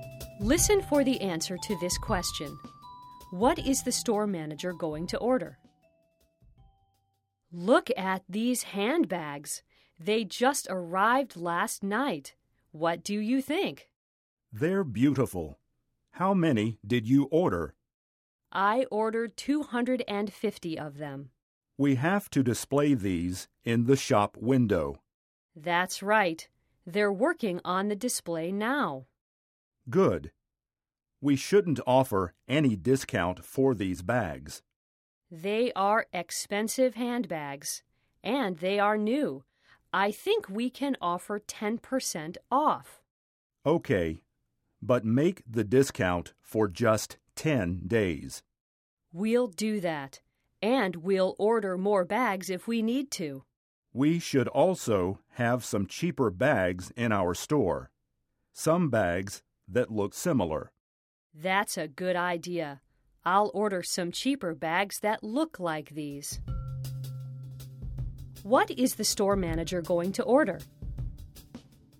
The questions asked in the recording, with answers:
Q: What is the store manager going to order?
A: She is going to order cheaper handbags.